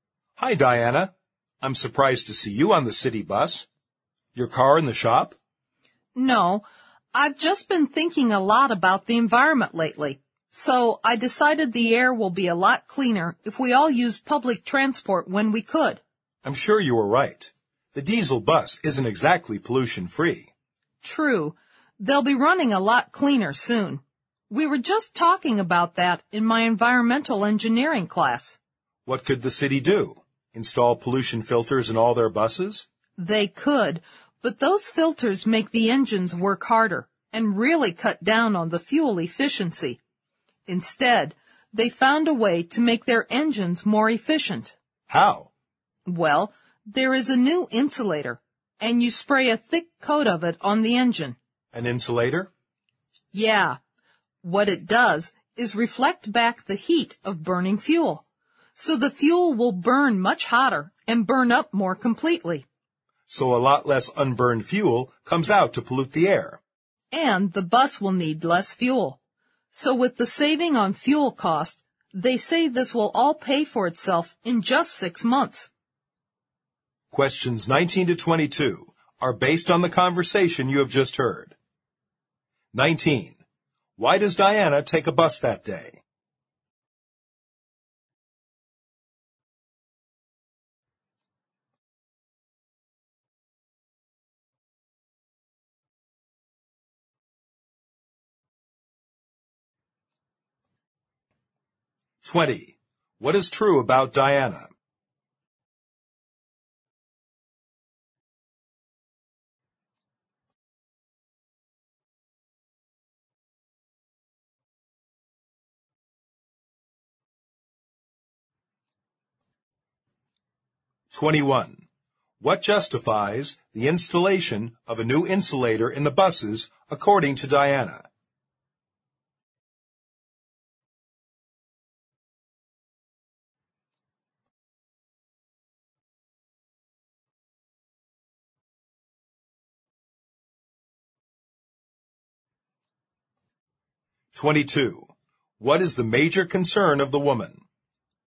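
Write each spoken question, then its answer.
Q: Why does Diana take a bus that day?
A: She is concerned about the environment and wants cleaner air

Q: What justifies the installation of a new insulator in the buses according to Diana?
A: It saves fuel and pays for itself in 6 months

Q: What is the major concern of the woman?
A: The environment and air pollution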